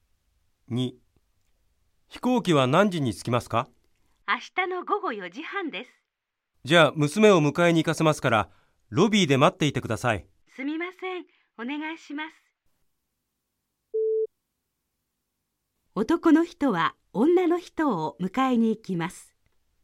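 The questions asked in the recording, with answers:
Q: 男の人は女の人を迎えに行きます。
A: ×(迎えに行くのは娘)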